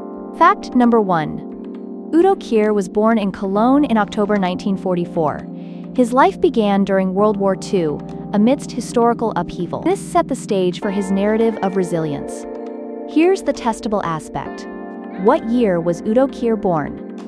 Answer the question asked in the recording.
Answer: Correct answer, 1944.